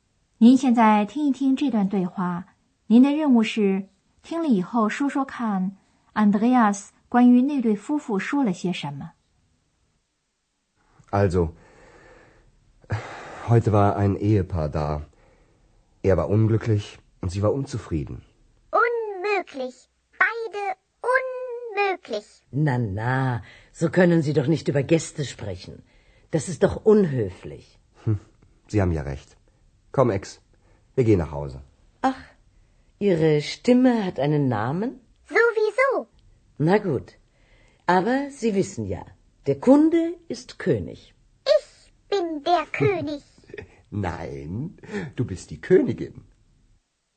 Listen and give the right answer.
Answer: 他说的是,那位先生有点垂头丧气,那位太太老是不满意。